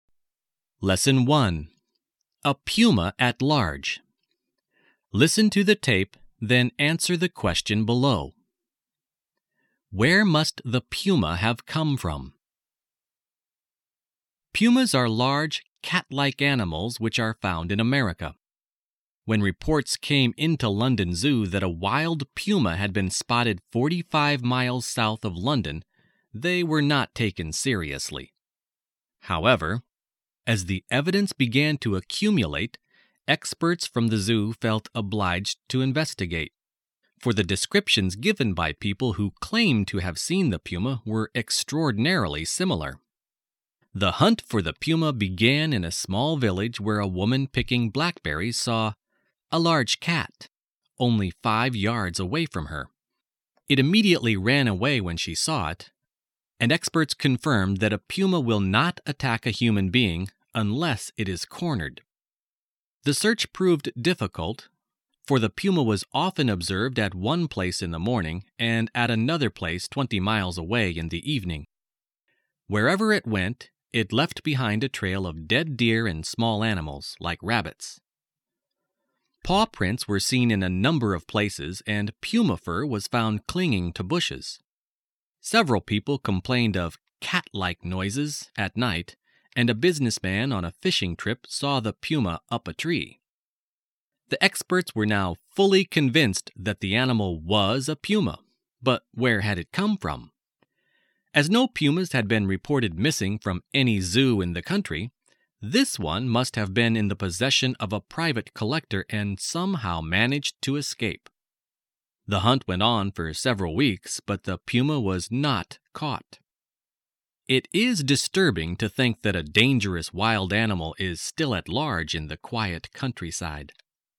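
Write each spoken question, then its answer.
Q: Where must the puma have come from?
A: From a private collector, from whom it somehow escaped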